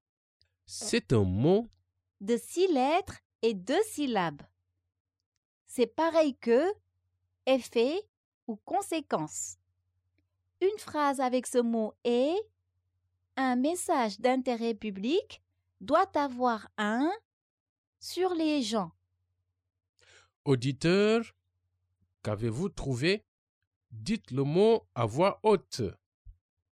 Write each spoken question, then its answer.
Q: Auditeur, qu'avez-vous trouvé?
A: Le mot mystère est « Impact ».